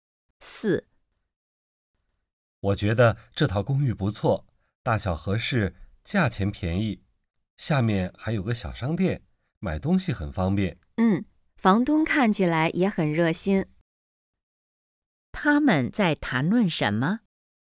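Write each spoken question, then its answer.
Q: 他们在谈论什么?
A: 一套公寓(租房子)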